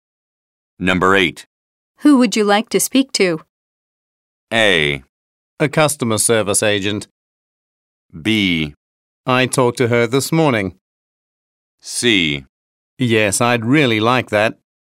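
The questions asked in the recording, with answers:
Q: Who would you like to speak to?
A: A: A customer service agent.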